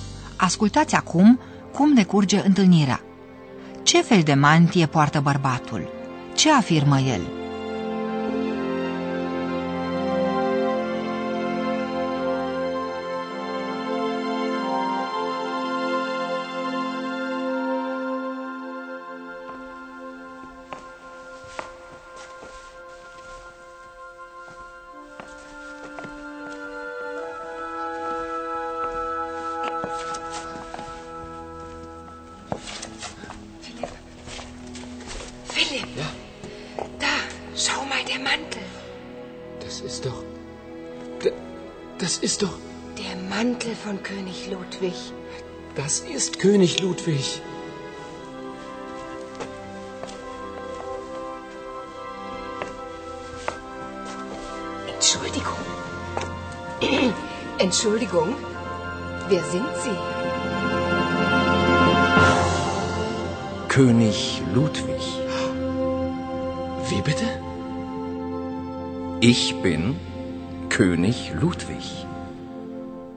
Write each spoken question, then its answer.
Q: Ce afirmă el?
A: Vă puteți imagina mirarea lui Paula și Filip când omul afirmă că el e regele Ludovic.